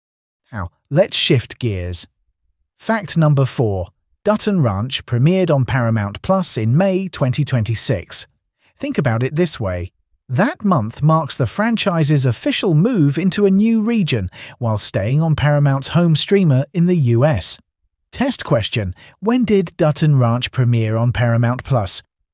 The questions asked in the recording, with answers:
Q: when did Dutton Ranch premiere on Paramount Plus?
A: May 2026.